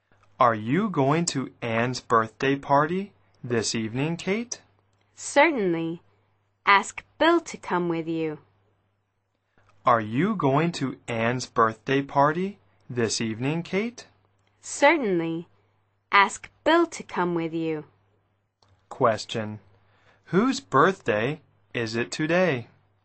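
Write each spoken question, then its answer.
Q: Whose birthday is it today?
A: Anne's.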